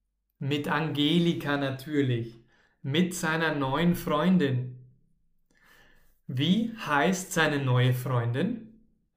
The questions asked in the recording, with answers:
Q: Wie heißt seine neue Freundin?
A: Seine neue Freundin heißt Angelika.